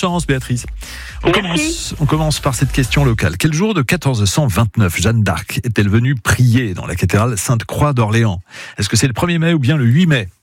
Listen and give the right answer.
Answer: Bonne réponse, 8 mai, c'est un vendredi.